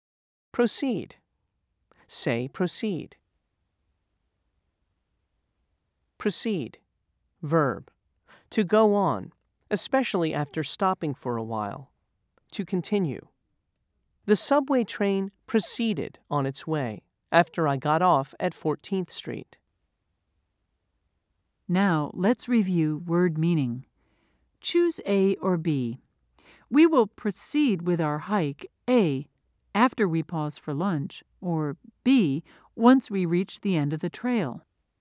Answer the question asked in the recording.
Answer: If you said A, you were right.